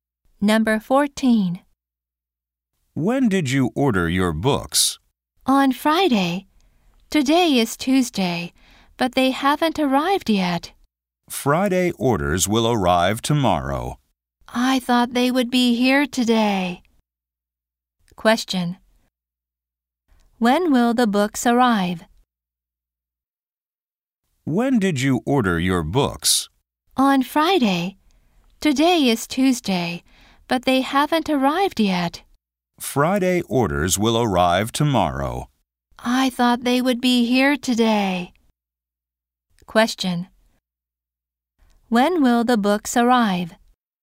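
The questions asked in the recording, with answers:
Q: When will the books arrive?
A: Tomorrow (Wednesday).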